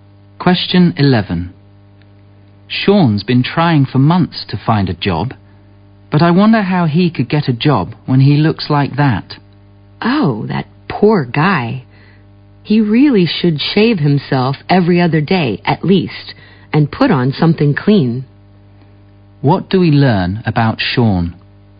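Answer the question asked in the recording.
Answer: He looks untidy (unshaven, dirty clothes), which hurts his job search.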